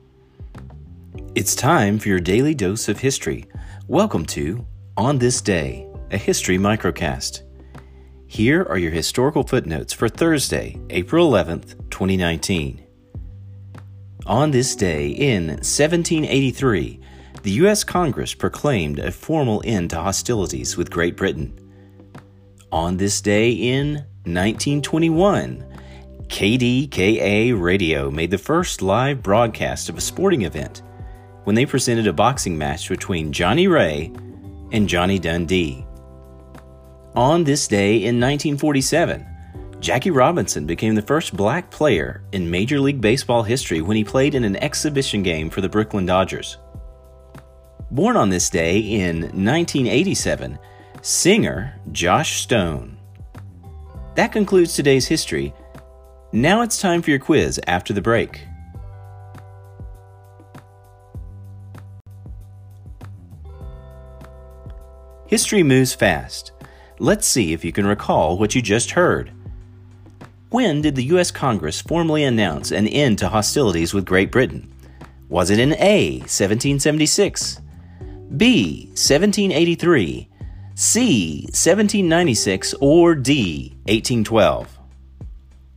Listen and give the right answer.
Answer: The answer? B, 1783.